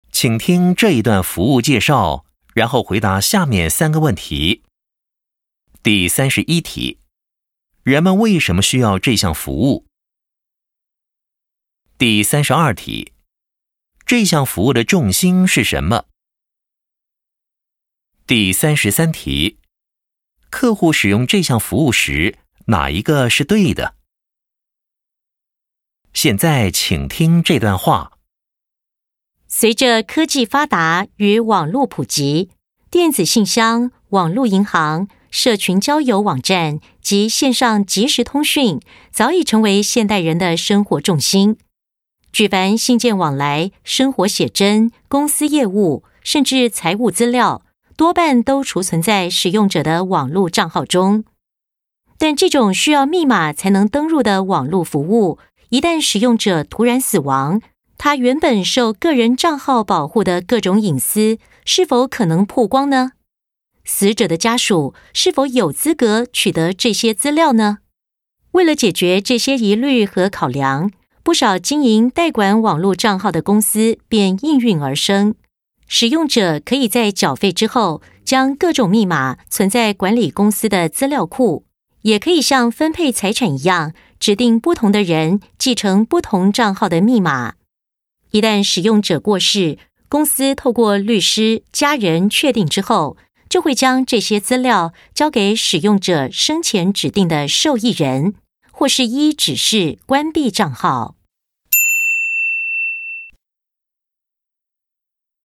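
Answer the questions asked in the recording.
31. 因为使用者突然死亡后,受密码保护的网络账号里的隐私可能曝光,家属也未必有资格取得这些资料
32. 代管网络账号的密码,使用者死后交给指定的受益人或关闭账号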